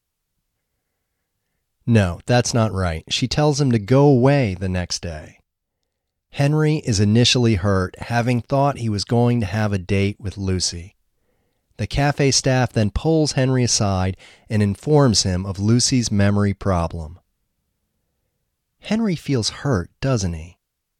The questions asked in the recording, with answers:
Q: Henry feels hurt, doesn't he?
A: Yes, Henry feels hurt.